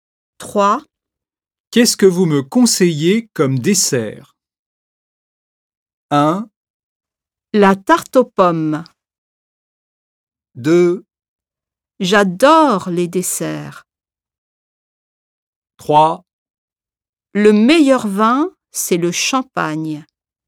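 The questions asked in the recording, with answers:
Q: Qu'est-ce que vous me conseillez comme dessert?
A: 1: La tarte aux pommes.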